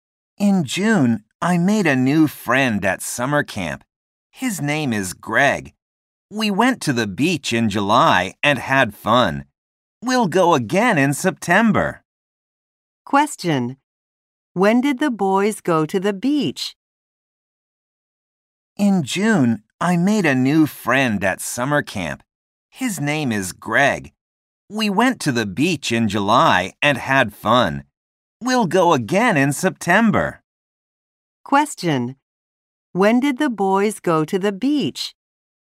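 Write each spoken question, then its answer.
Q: When did the boys go to the beach?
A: In July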